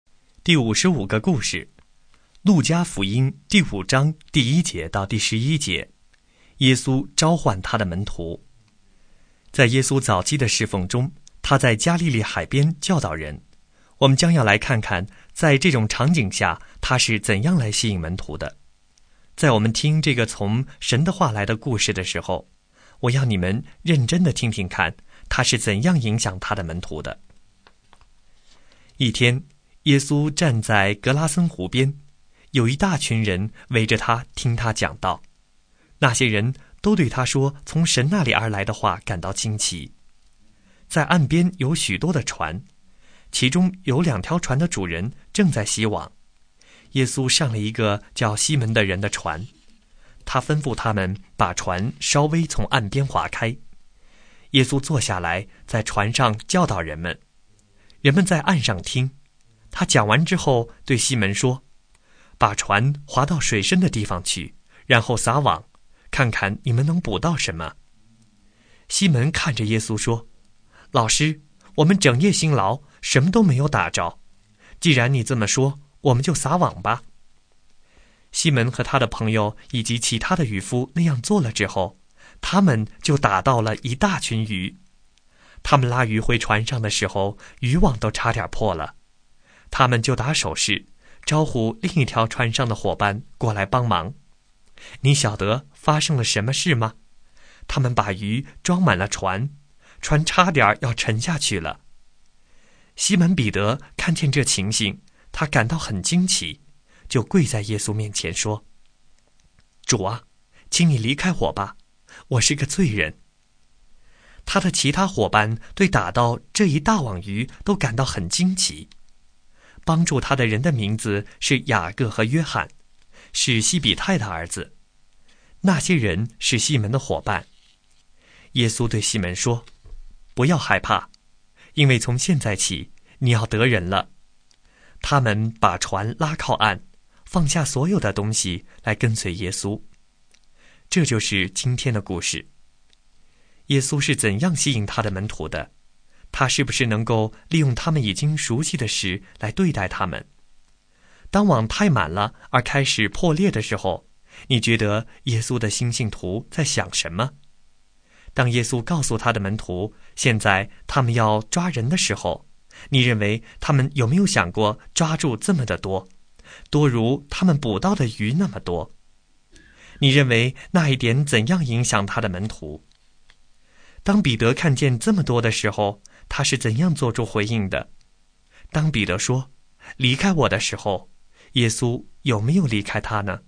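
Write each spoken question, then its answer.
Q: 他是不是能够利用他们已经熟悉的事来对待他们?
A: 是的,他利用了他们熟悉的捕鱼

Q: 当彼得看见这么多的时候,他是怎样做出回应的?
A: 他跪在耶稣面前说:主啊,请你离开我吧,我是个罪人

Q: 当彼得说,离开我的时候,耶稣有没有离开他呢?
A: 没有,耶稣对他说不要害怕,从现在起你要得人了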